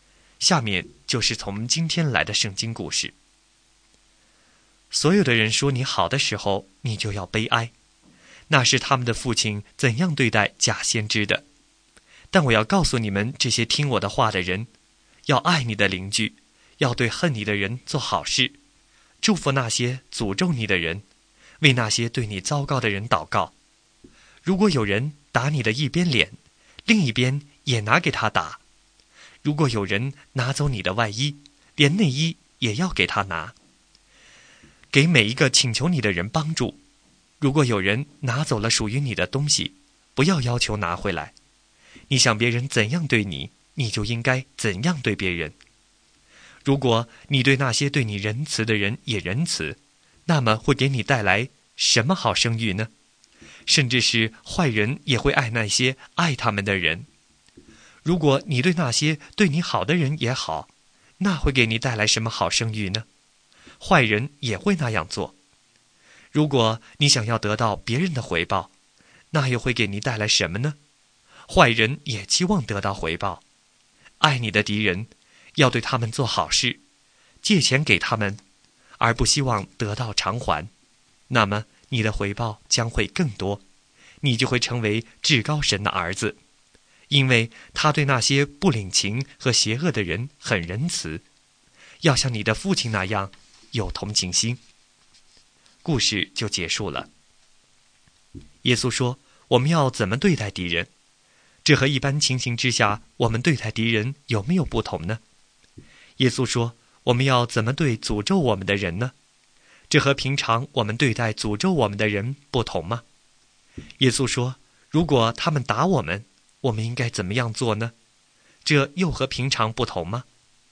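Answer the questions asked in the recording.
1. 爱你的敌人,要对他们做好事
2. 祝福那些诅咒你的人
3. 另一边脸也拿给他打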